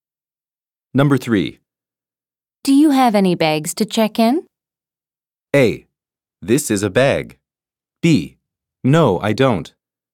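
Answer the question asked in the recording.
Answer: B: No, I don't.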